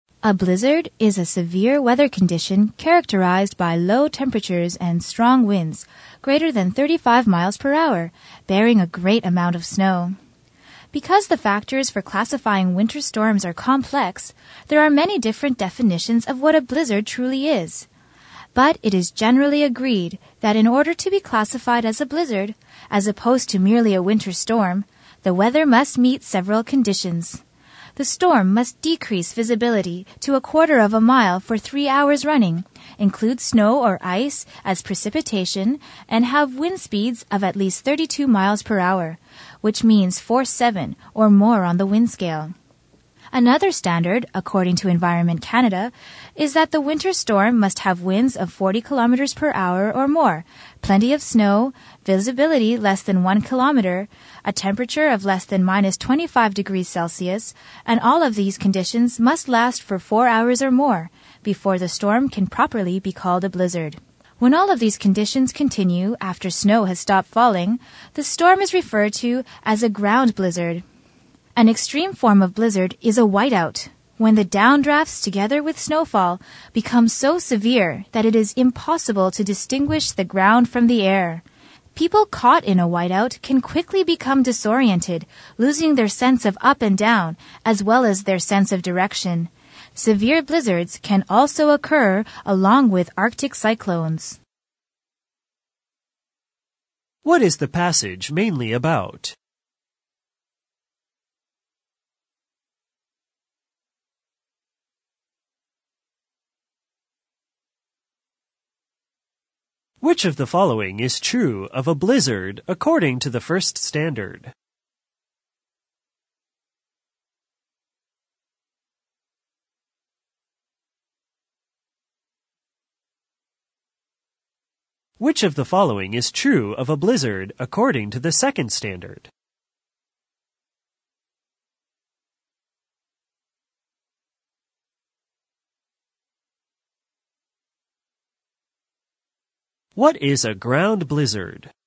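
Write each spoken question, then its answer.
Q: What is the passage mainly about?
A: What a blizzard is and the conditions for classifying a storm as a blizzard

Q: What is a ground blizzard?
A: A storm in which blizzard conditions continue after snow has stopped falling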